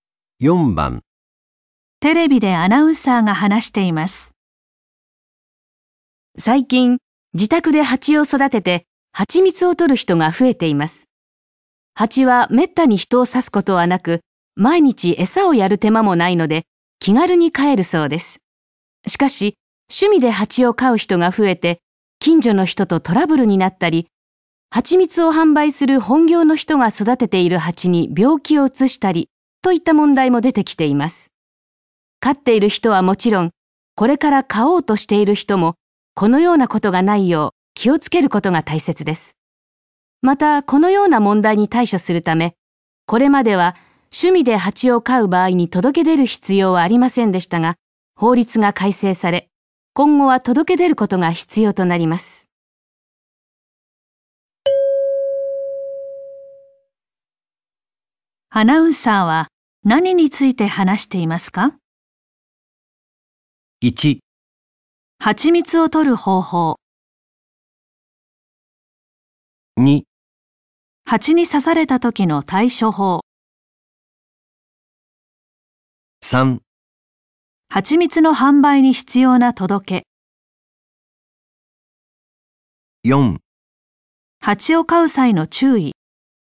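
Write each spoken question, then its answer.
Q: アナウンサーは何について話していますか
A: 4: 蜂を飼う際の注意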